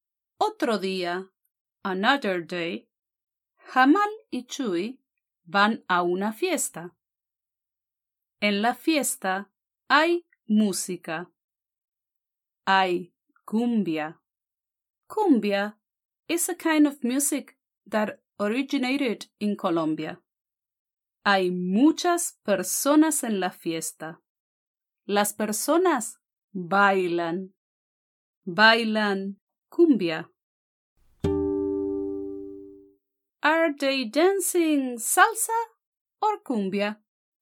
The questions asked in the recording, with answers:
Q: Are they dancing salsa or cumbia?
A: Sí, bailan cumbia.